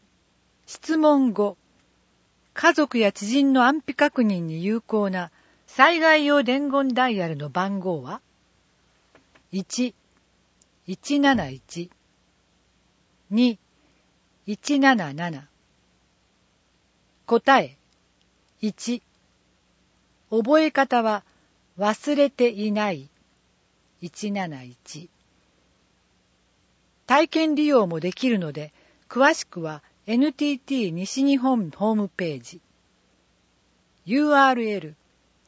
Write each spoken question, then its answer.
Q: 家族や知人の安否確認に有効な災害用伝言ダイヤルの番号は?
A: 答え1。